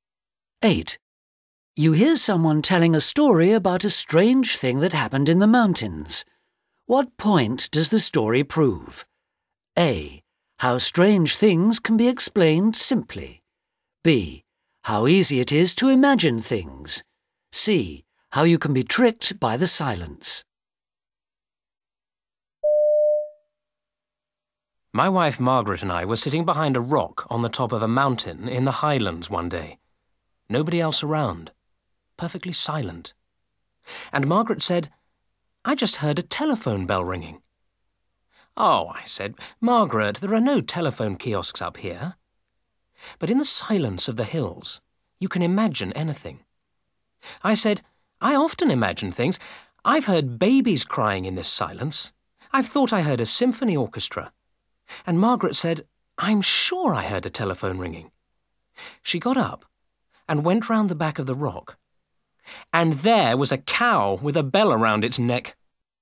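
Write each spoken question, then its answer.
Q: What point does the story prove?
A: A: How strange things can be explained simply.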